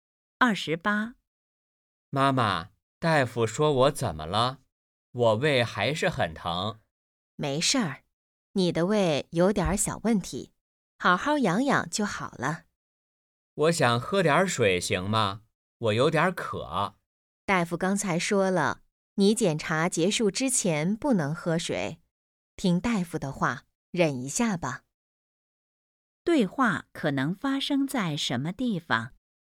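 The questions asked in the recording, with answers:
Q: 对话可能发生在什么地方?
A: 医院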